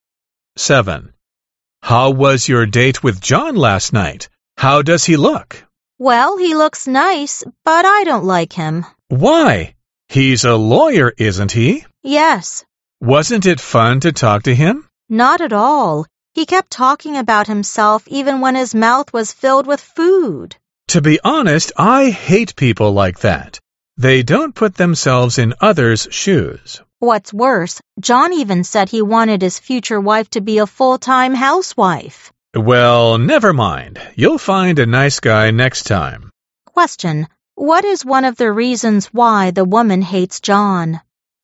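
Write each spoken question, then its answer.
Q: What is one of the reasons why the woman hates John?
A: He kept talking about himself, even with food in his mouth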